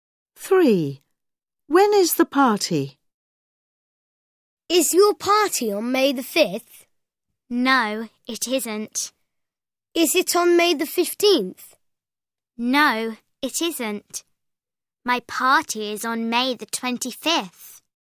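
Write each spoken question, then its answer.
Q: When is the party?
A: On May the 25th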